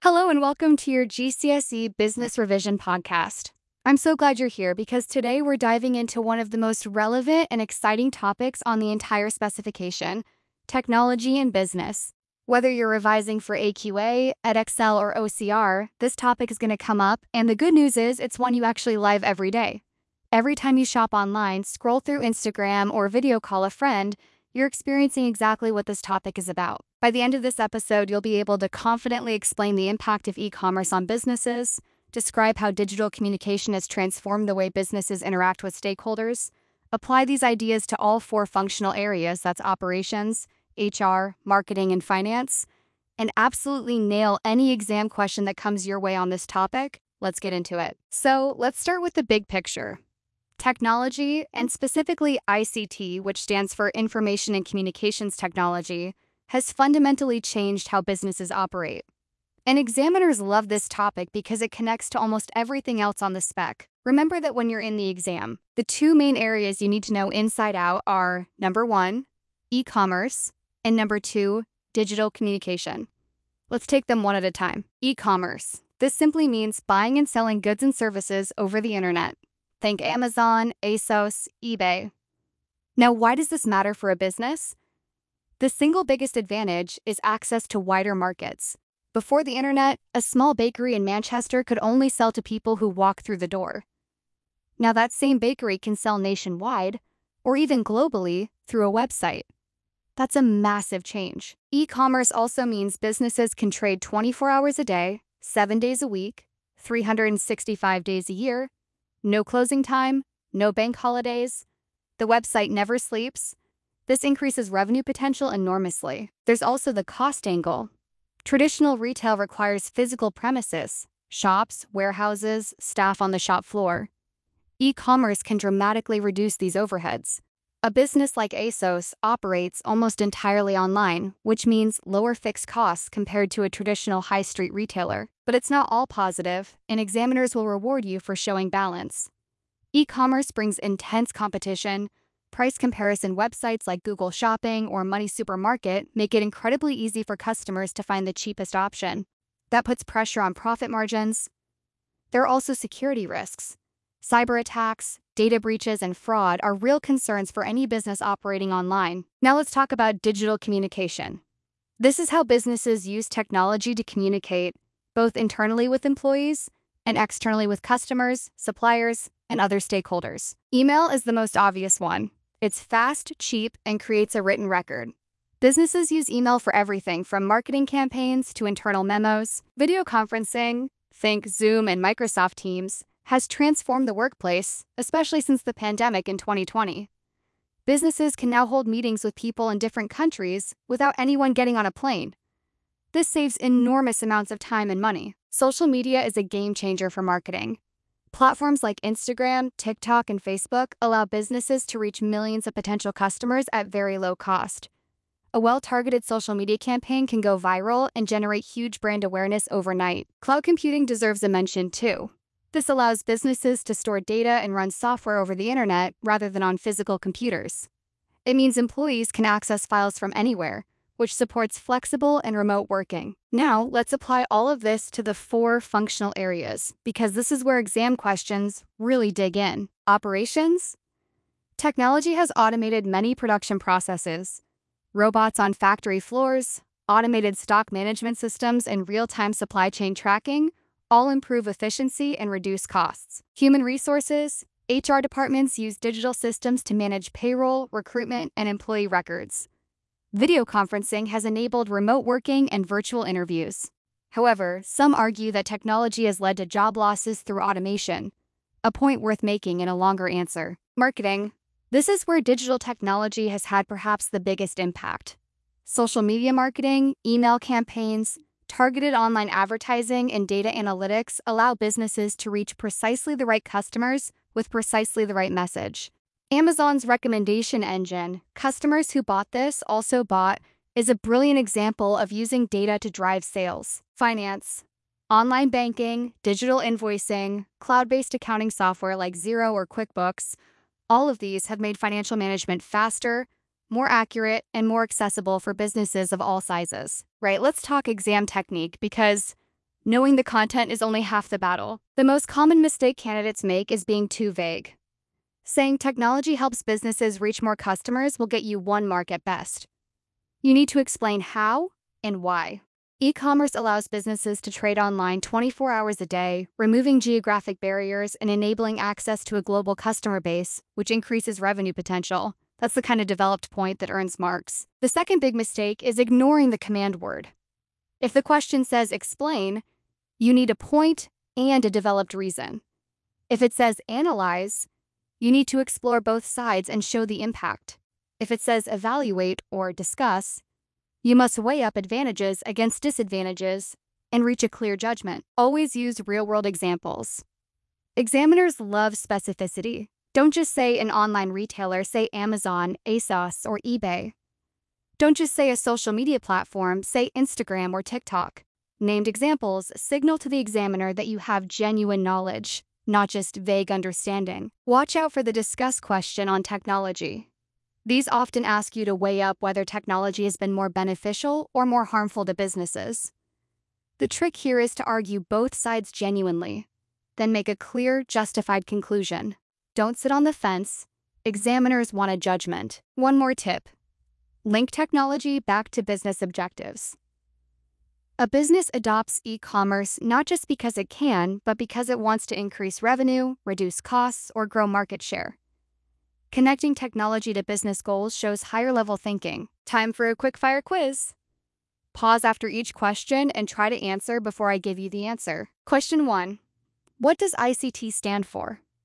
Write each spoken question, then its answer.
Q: What does ICT stand for?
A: Information and communications technology.